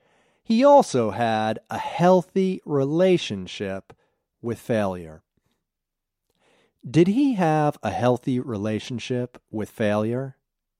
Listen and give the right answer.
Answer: Yes, he had a healthy relationship with failure.